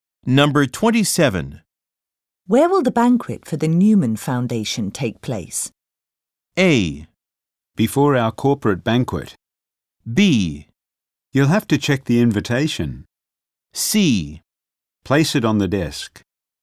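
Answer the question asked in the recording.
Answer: B: You'll have to check the invitation.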